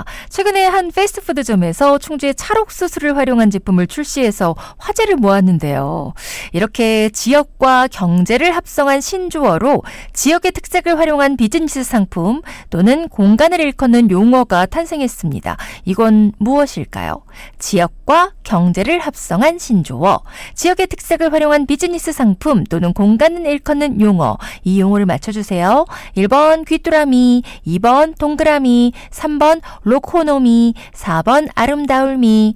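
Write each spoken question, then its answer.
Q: 이건 무엇일까요? 지역과 경제를 합성한 신조어, 지역의 특색을 활용한 비즈니스 상품 또는 공간을 일컫는 용어, 이 용어를 맞춰주세요.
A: 3번: 로코노미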